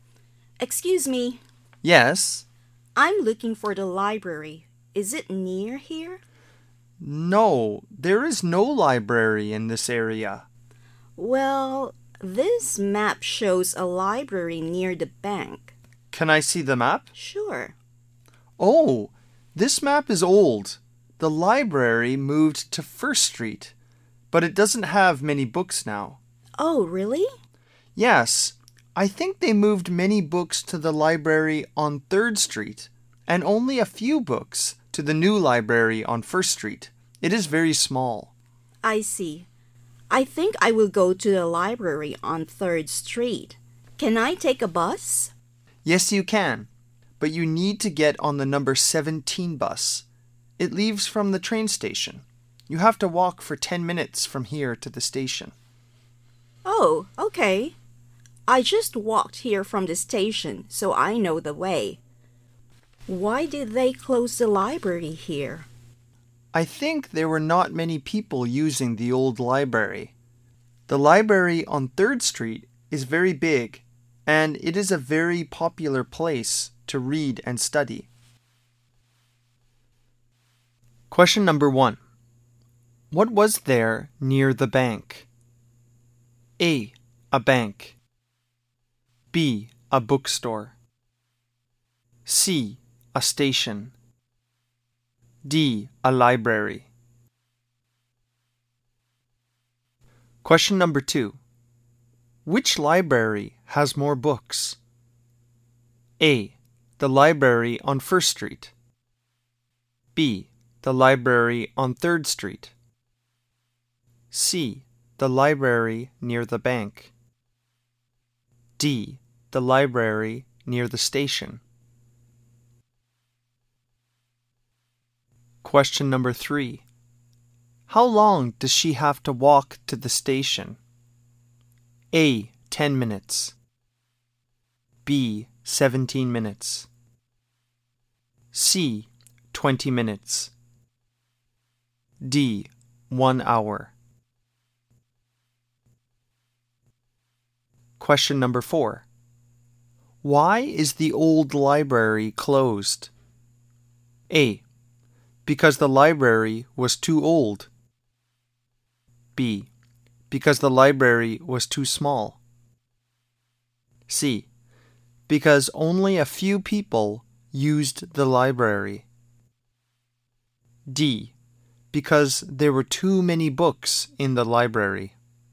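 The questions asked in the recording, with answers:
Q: What was there near the bank?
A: D: A library.

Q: Which library has more books?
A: B: The library on 3rd Street.

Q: How long does she have to walk to the station?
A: A: 10 minutes.

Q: Why is the old library closed?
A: C: Because only a few people used the library.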